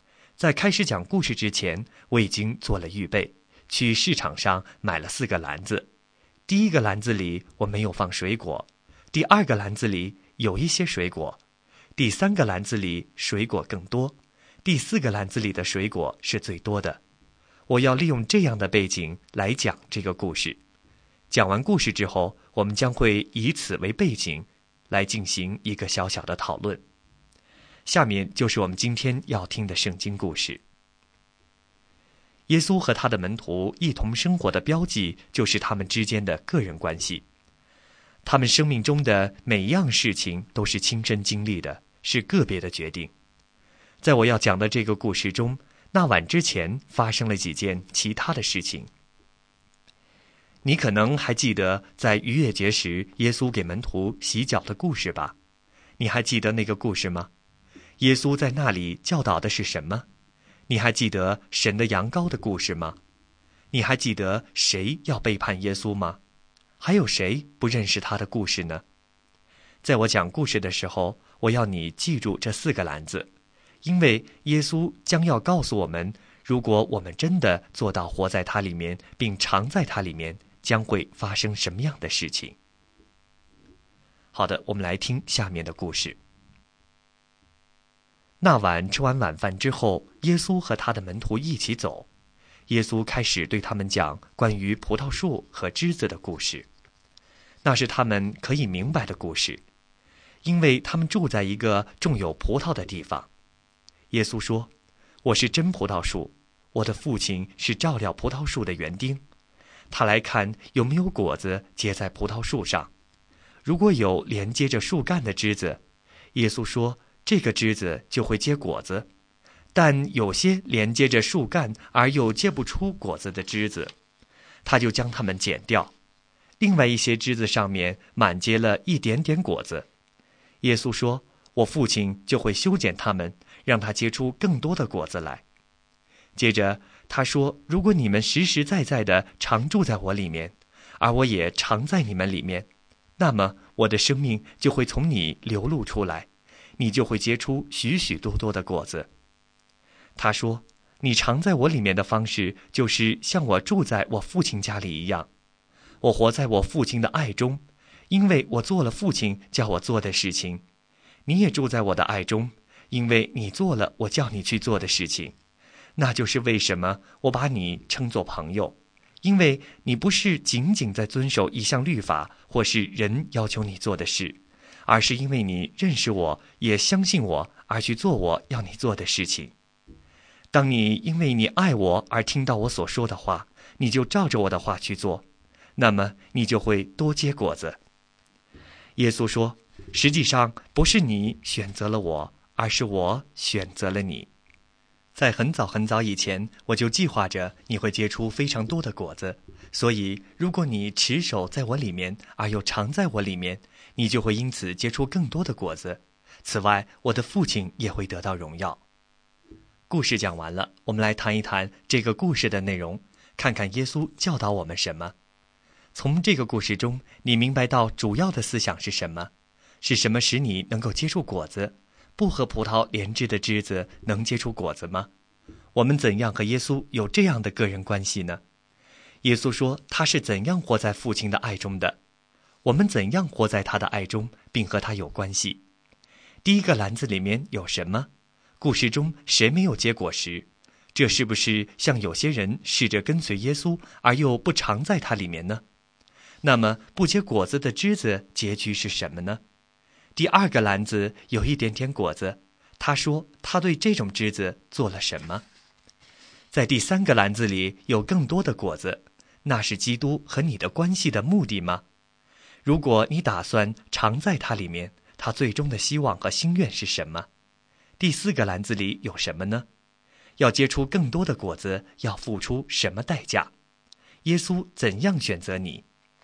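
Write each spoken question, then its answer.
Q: 耶稣说他是怎样活在父亲的爱中的?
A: 因为他做了父亲叫他做的事情

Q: 第一个篮子里面有什么?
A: 没有水果

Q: 那么不结果子的枝子结局是什么呢?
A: 被剪掉

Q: 第二个篮子有一点点果子,他说他对这种枝子做了什么?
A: 修剪它们,让它结出更多的果子

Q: 第四个篮子里有什么呢?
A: 最多的水果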